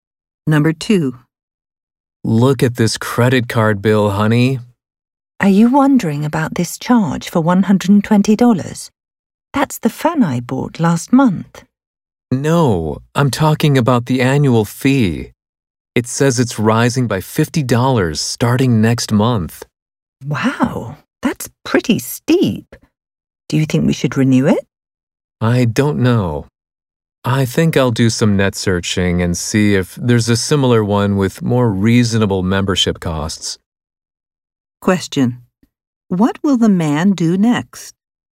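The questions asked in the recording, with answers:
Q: What will the man do next?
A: Search online for a similar credit card with a lower annual fee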